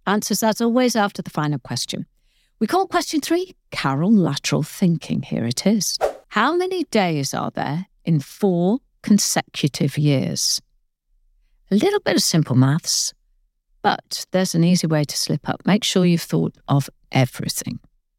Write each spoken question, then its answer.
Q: How many days are there in four consecutive years?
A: 1,461.